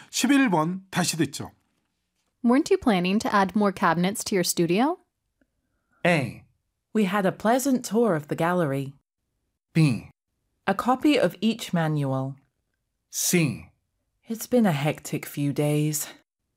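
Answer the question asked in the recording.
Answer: C: It's been a hectic few days.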